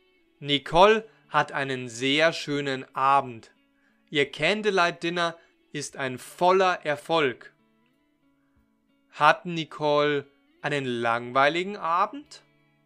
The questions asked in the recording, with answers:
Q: Hat Nicole einen langweiligen Abend?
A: Nein, sie hat keinen langweiligen Abend.